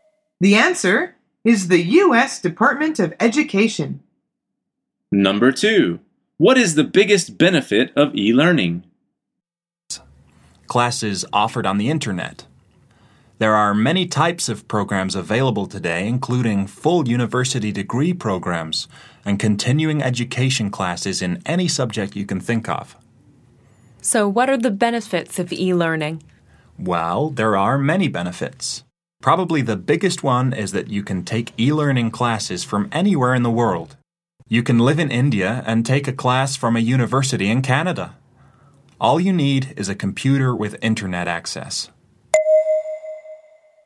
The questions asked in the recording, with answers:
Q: What is the biggest benefit of e-learning?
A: The answer is you can take e-learning classes from anywhere in the world.